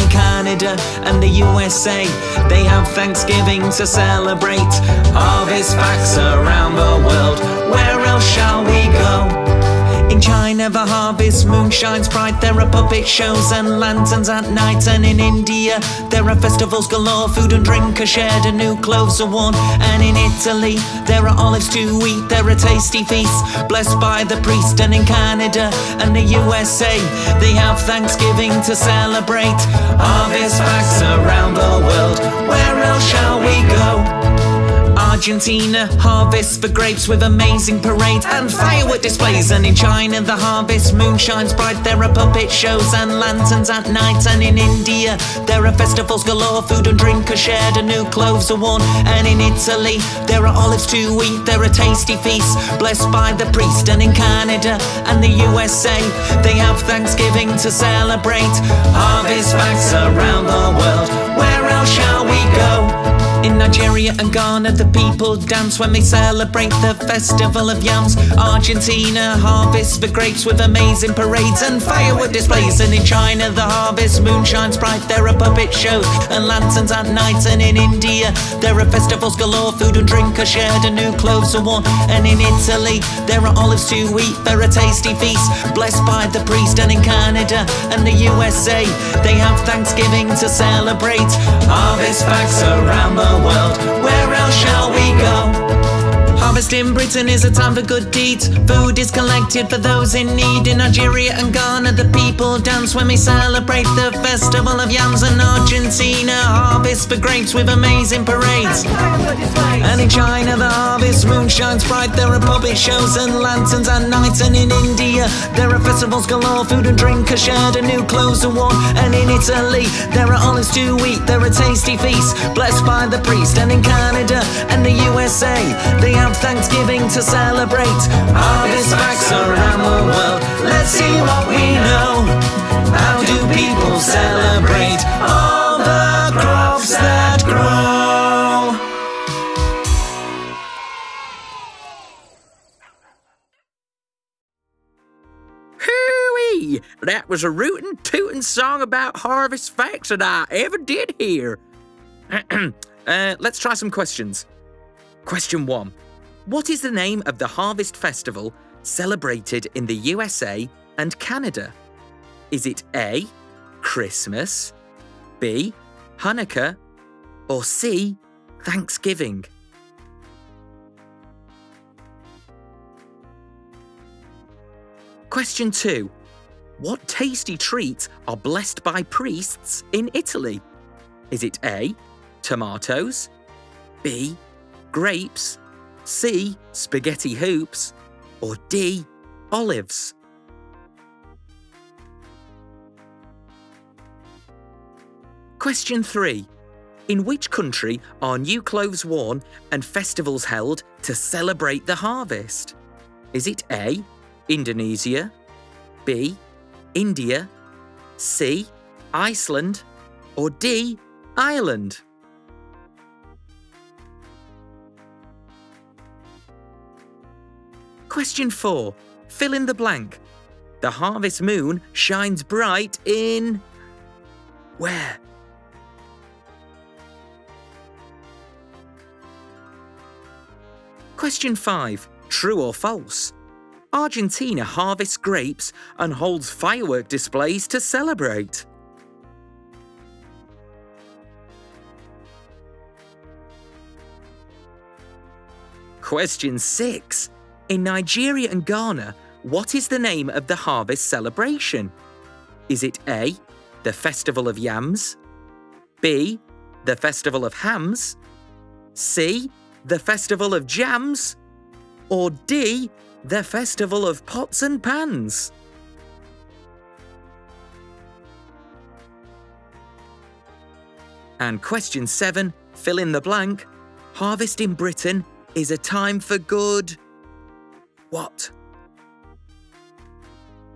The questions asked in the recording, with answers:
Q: What is the name of the harvest festival celebrated in the USA and Canada?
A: The answer is C, Thanksgiving.

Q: What tasty treats are blessed by priests in Italy?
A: the answer is D, olives.

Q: In which country are new clothes worn and festivals held to celebrate the harvest?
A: The answer is B, India.

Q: The harvest moon shines bright in...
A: The harvest moon shines bright in China.

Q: Argentina harvests grapes and holds firework displays to celebrate.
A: And the answer is true.

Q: In Nigeria and Ghana, what is the name of the harvest celebration?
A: And the answer is A, the Festival of Yams.

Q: Harvest in Britain is a time for good...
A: Harvest in Britain is a time for good deeds.